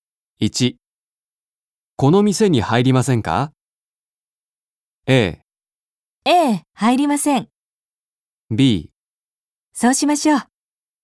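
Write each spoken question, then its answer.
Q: この店に入りませんか?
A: B: そうしましょう。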